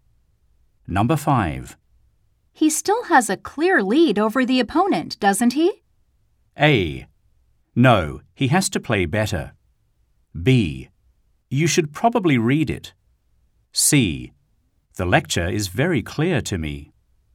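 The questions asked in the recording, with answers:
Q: He still has a clear lead over the opponent, doesn't he?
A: A: No, he has to play better.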